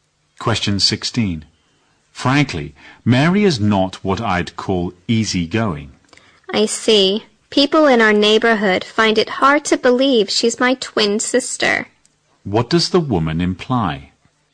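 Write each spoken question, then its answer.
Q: What does the woman imply?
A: She and her twin sister Mary have very different personalities.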